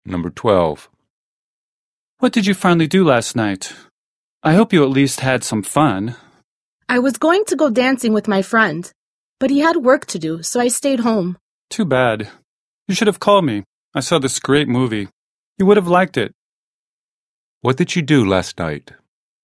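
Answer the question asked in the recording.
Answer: Stayed home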